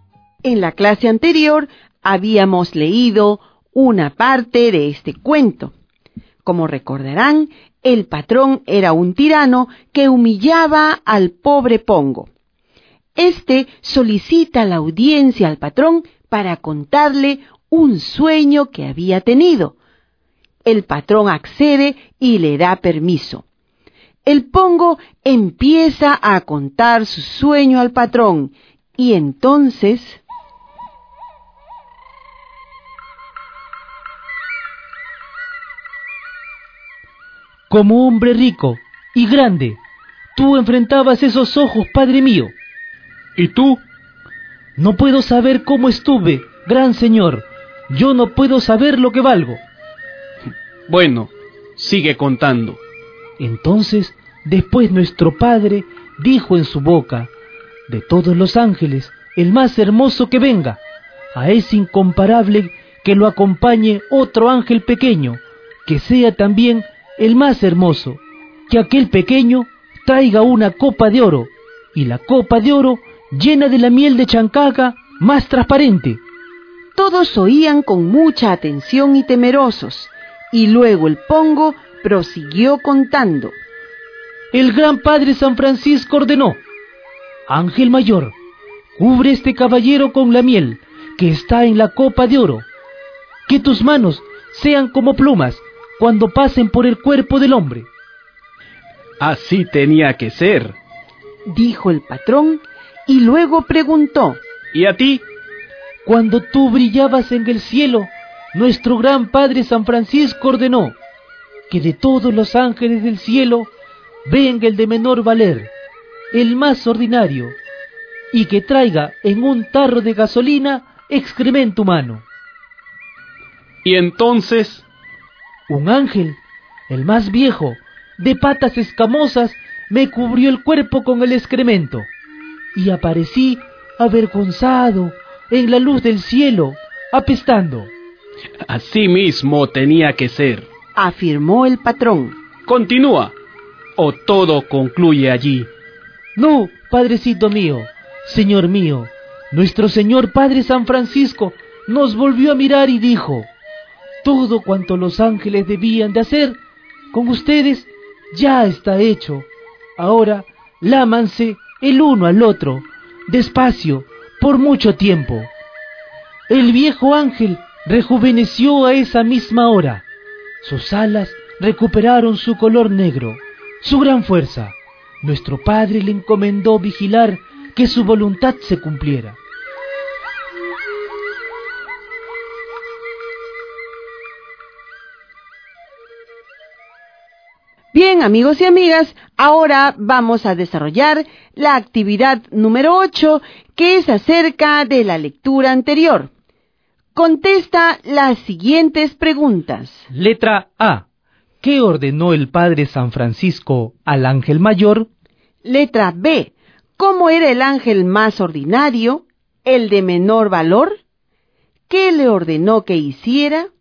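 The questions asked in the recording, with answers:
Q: Letra A. ¿Qué ordenó el padre San Francisco al ángel mayor?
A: Que cubriera al caballero (el patrón) con la miel de la copa de oro, con manos suaves como plumas

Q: Letra B. ¿Cómo era el ángel más ordinario, el de menor valor? ¿Qué le ordenó que hiciera?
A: Era el más viejo, de patas escamosas; le ordenó cubrir al Pongo con excremento humano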